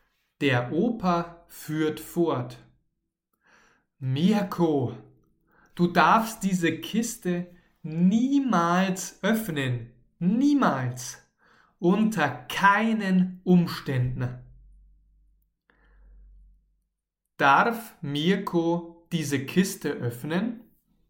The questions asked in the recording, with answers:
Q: Kiste öffnen?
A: Nein, niemals. Mirko darf niemals diese Kiste öffnen.